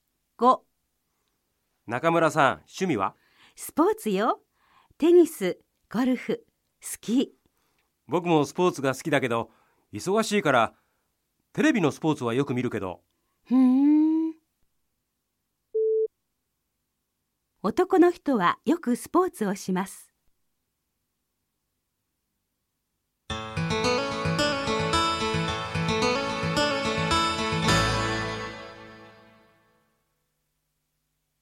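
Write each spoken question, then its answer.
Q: 男の人はよくスポーツをします。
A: 正しくない(いいえ)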